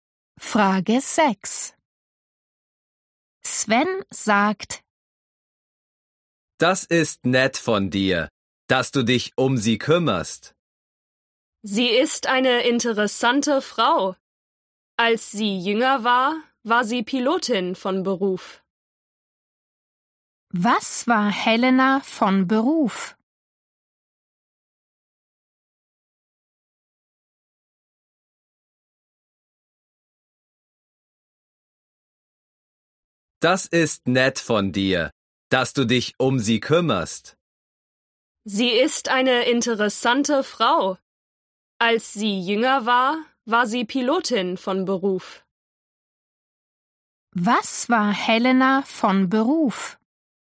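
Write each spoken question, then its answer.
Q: Was war Helena von Beruf?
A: Pilotin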